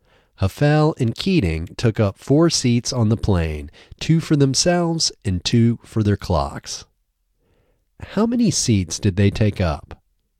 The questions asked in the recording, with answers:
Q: How many seats did they take up?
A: They took up four seats.